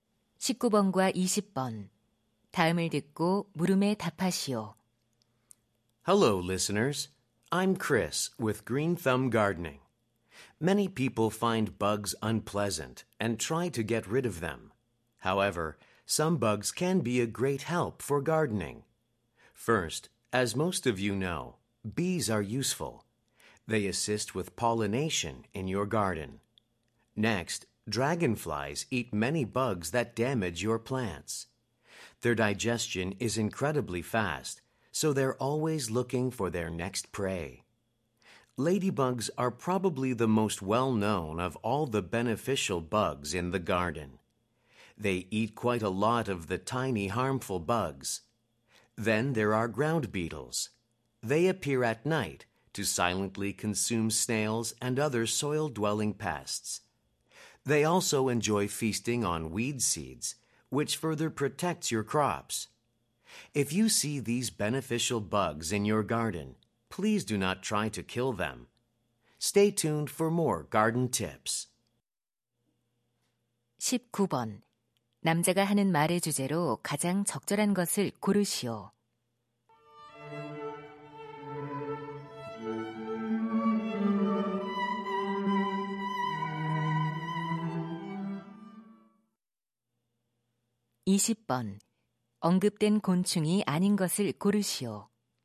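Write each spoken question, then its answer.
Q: 남자가 하는 말의 주제로 가장 적절한 것을 고르시오.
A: 정원 가꾸기에 도움이 되는 곤충들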